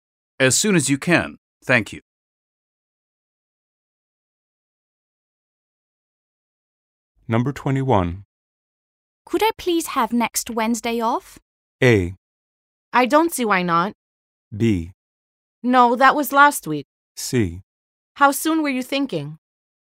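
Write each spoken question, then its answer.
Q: Could I please have next Wednesday off?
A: A: I don't see why not.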